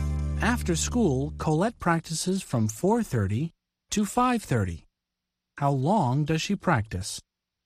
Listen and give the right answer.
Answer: For an hour. She practices for an hour.